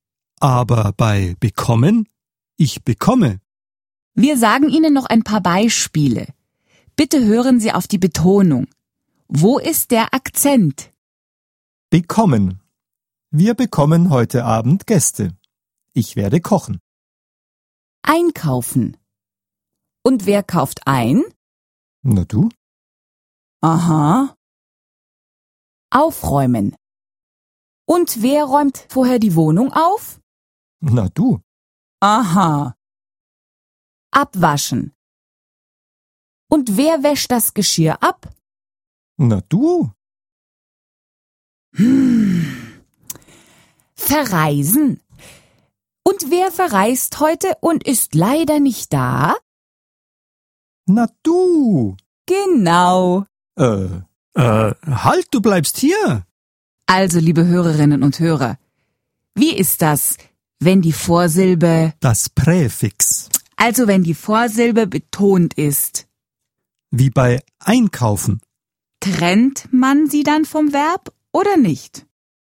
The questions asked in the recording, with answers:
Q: Trennt man sie dann vom Verb oder nicht?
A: Wenn die Vorsilbe betont ist, trennt man sie vom Verb.